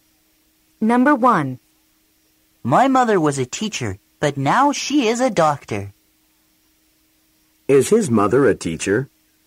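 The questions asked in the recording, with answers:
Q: Is his mother a teacher?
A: No, she isn't. She is a doctor now.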